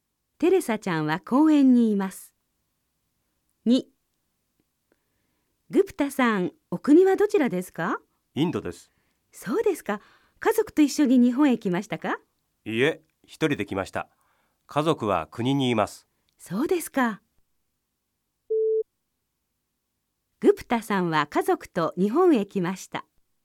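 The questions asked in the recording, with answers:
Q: そうですか。グプタさんは家族と日本へ来ました。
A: ×(正しくない)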